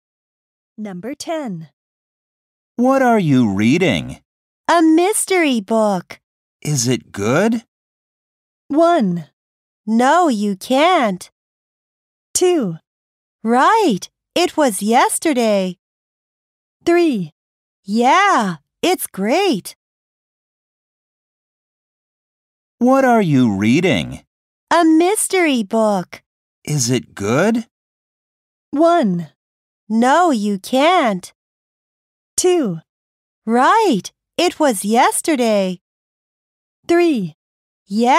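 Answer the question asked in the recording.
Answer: 3: Yeah, it's great.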